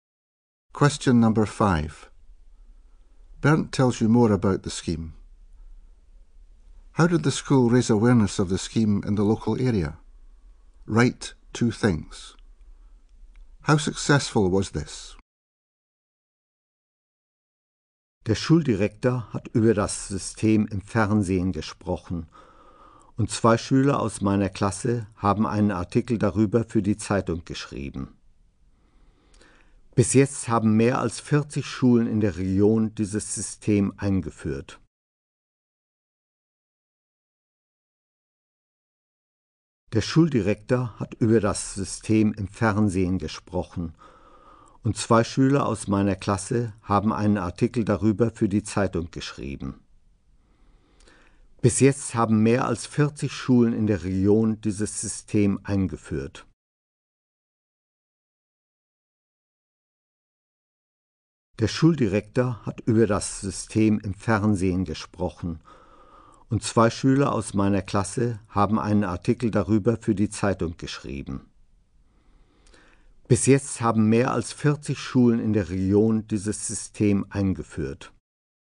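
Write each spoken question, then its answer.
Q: How did the school raise awareness of the scheme in the local area?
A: The head teacher spoke about it on TV; two pupils wrote a newspaper article

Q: How successful was this?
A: More than 40 schools in the region have introduced the scheme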